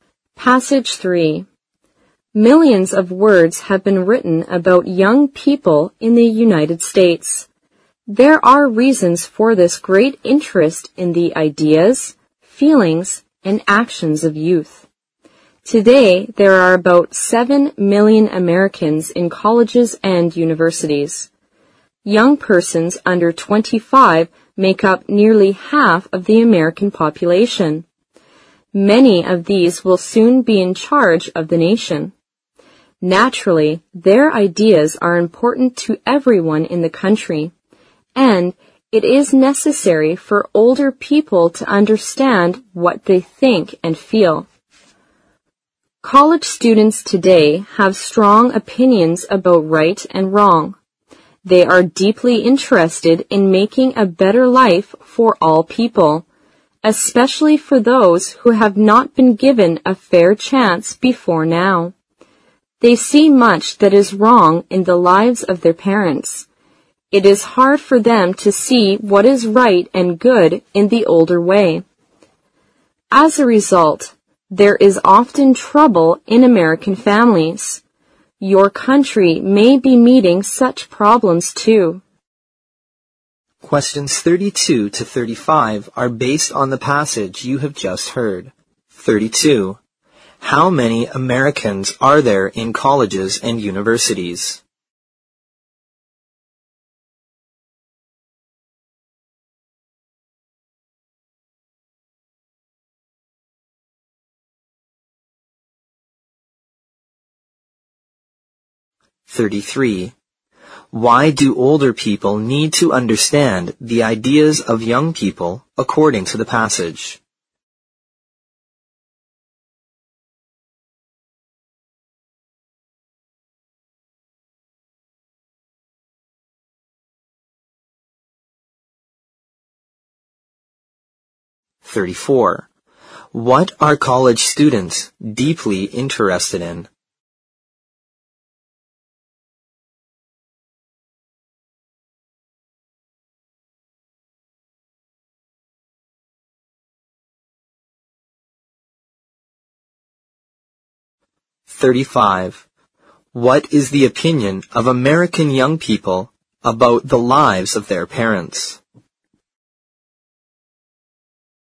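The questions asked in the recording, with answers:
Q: How many Americans are there in colleges and universities?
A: About 7 million

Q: Why do older people need to understand the ideas of young people according to the passage?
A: Many young people will soon be in charge of the nation

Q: What are college students deeply interested in?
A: Making a better life for all people

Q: What is the opinion of American young people about the lives of their parents?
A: They see much that is wrong in them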